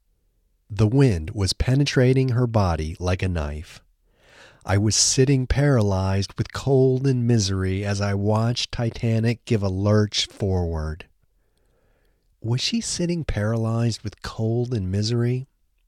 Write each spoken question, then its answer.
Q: Was she sitting paralyzed with cold and misery?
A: Yes, she was sitting paralyzed with cold and misery.